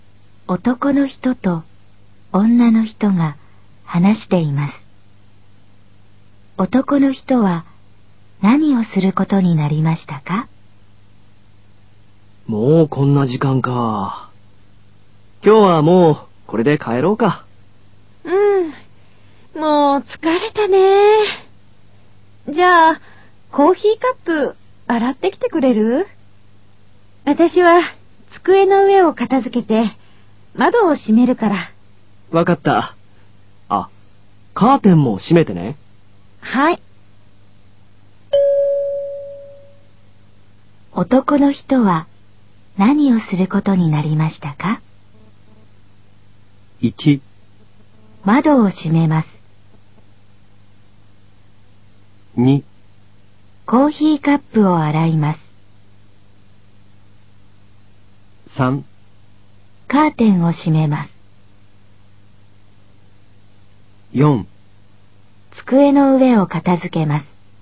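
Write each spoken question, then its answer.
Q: 男の人は何をすることになりましたか?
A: 2: コーヒーカップを洗います。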